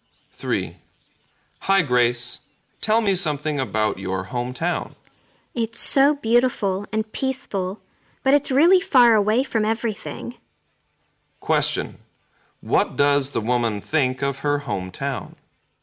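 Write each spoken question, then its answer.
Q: Question. What does the woman think of her hometown?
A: It is beautiful and peaceful but far away from everything.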